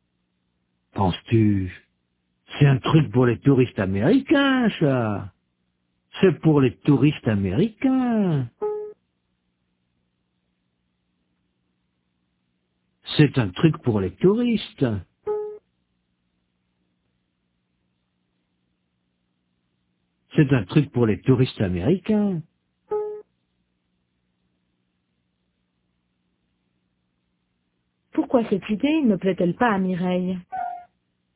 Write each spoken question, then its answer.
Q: Pourquoi cette idée ne plaît-elle pas à Mireille?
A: Parce que c'est un truc pour les touristes américains.